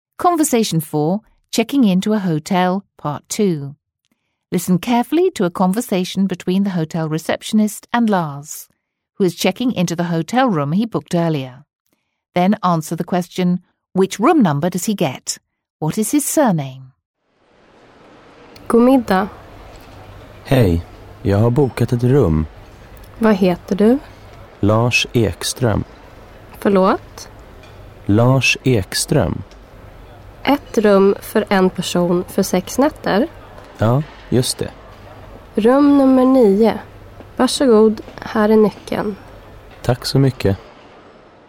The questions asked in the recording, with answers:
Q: which room number does he get?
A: That's right, room number 9.

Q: What is his surname?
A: Yes, it's Ekström.